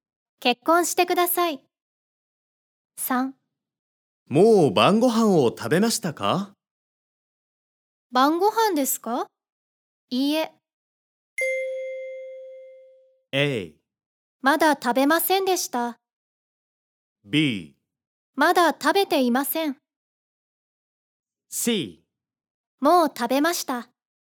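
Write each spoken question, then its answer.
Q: もう晩ご飯を食べましたか?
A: B: まだ食べていません。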